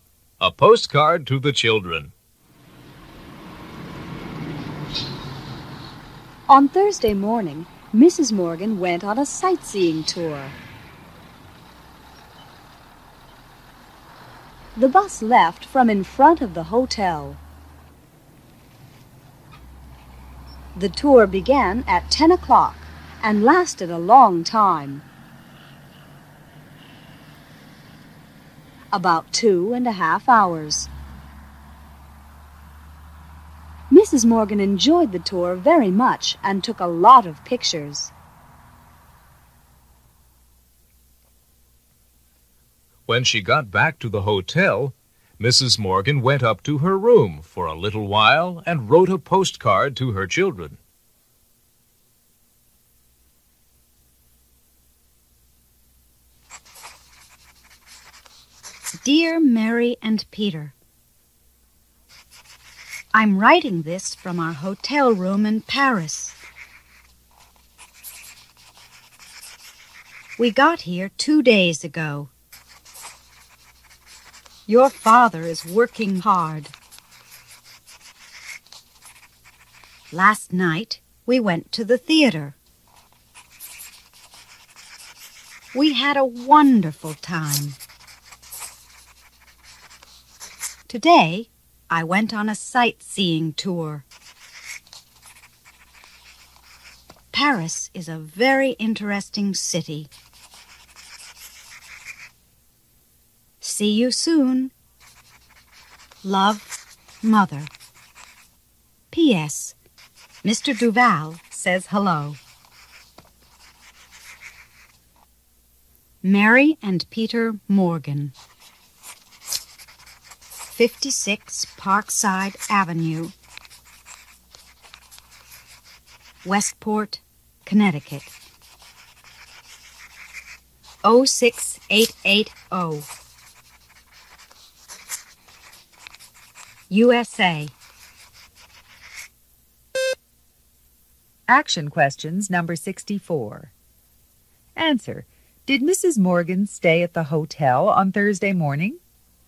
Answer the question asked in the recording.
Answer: No, she didn't.